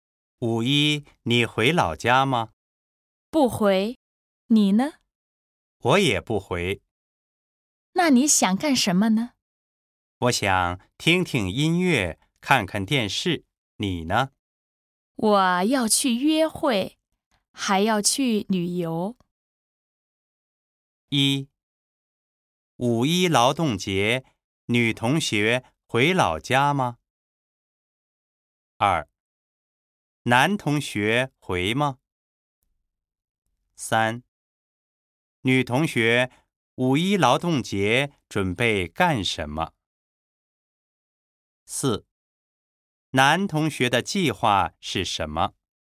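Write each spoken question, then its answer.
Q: 五一劳动节,女同学回老家吗?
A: 不回

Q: 男同学回吗?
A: 不回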